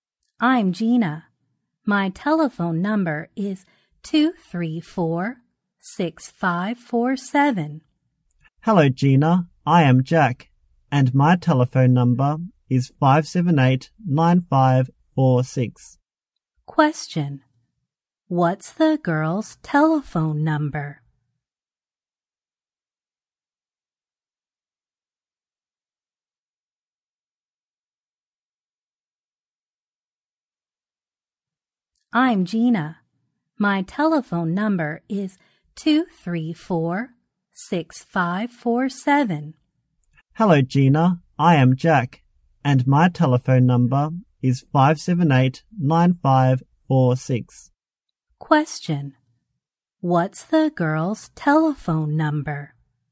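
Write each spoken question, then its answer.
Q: What's the girl's telephone number?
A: 234-6547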